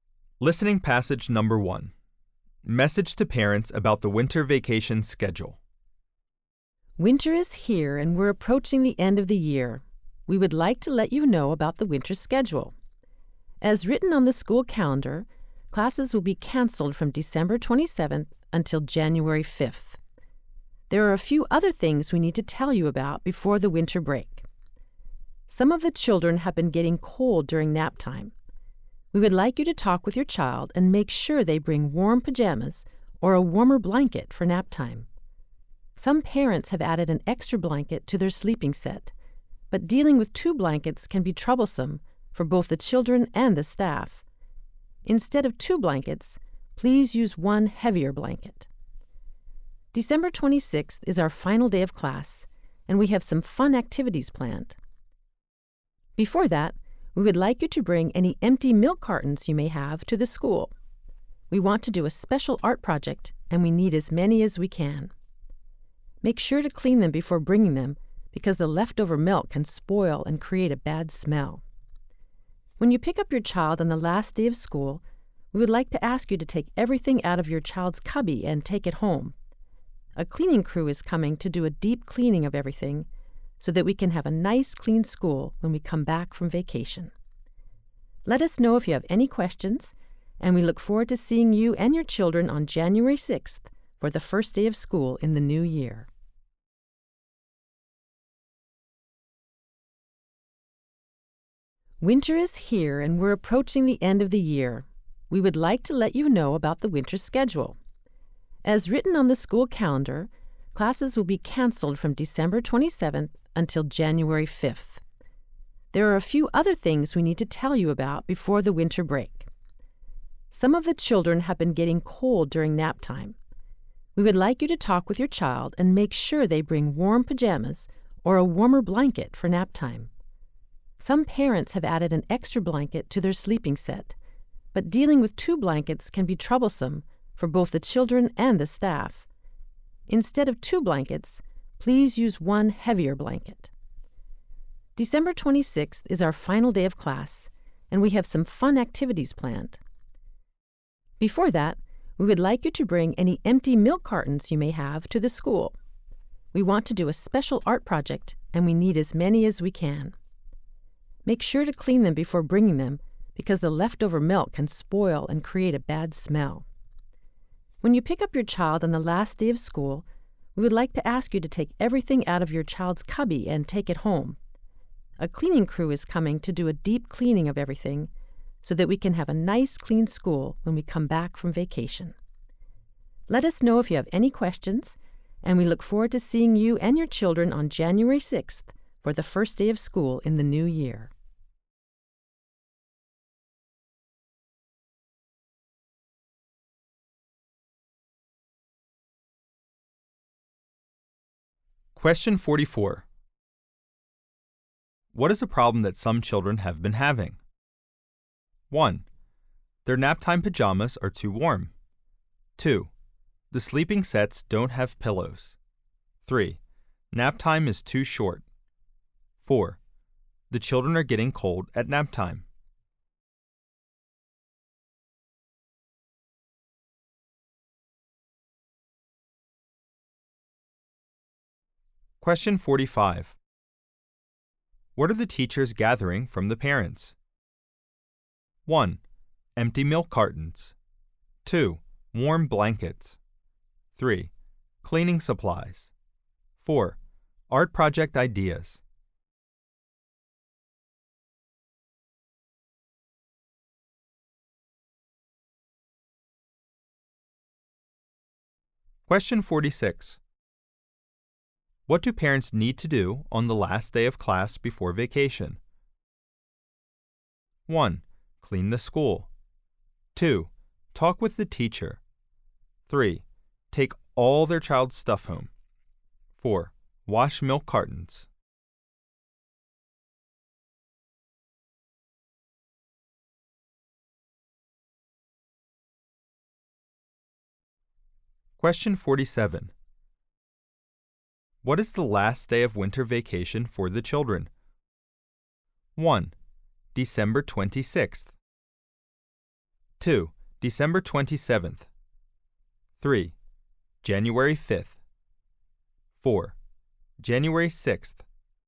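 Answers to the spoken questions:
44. 4: The children are getting cold at naptime.
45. 1: Empty milk cartons.
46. 3: Take all their child's stuff home.
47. 3: January 5th.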